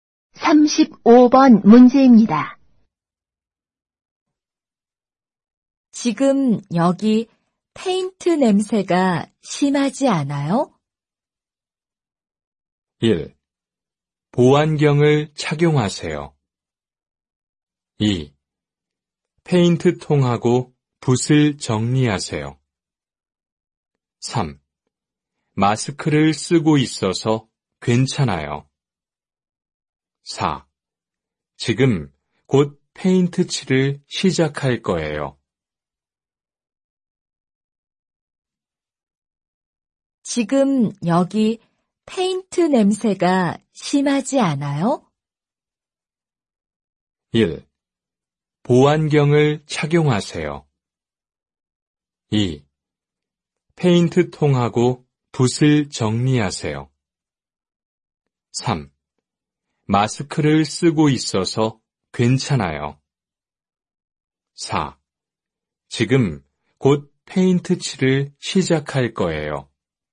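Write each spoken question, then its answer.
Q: 지금 여기 페인트 냄새가 심하지 않아요?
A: 3: 마스크를 쓰고 있어서 괜찮아요.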